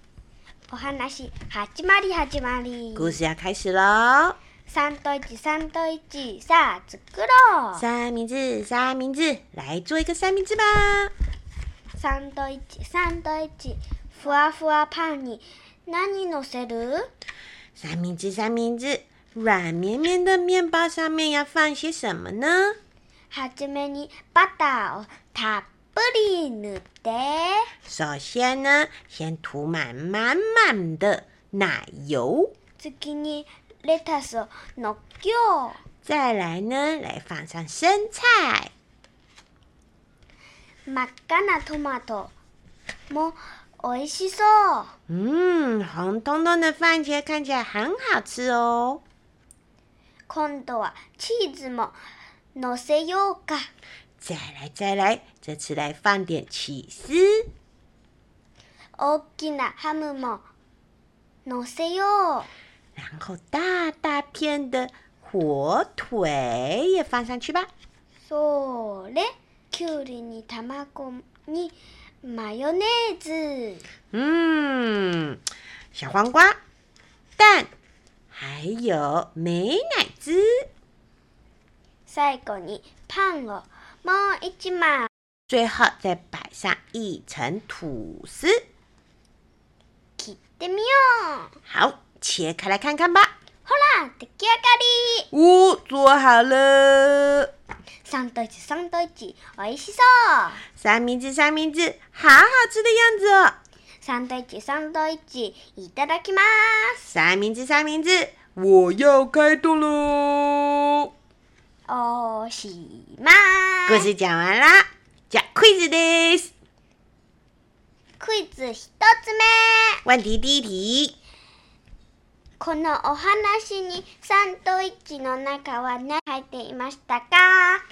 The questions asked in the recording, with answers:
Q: このお話にサンドイッチの中は何入っていましたか?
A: 奶油、生菜、